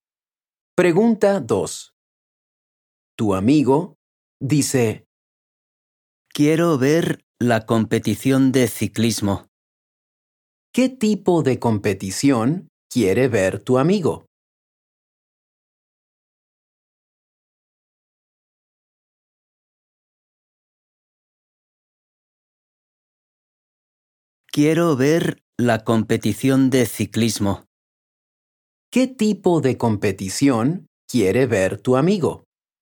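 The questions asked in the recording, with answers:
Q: ¿Qué tipo de competición quiere ver tu amigo?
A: De ciclismo.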